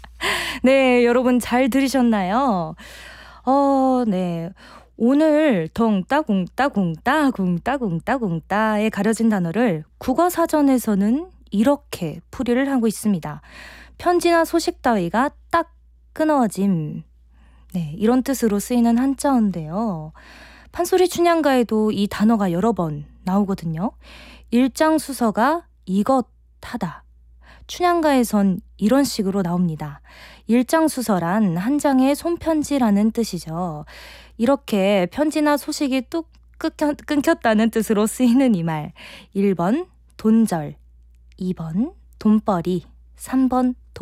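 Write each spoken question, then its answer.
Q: 이렇게 편지나 소식이 뚝 끊겼다는 뜻으로 쓰이는 이 말.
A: 1번: 돈절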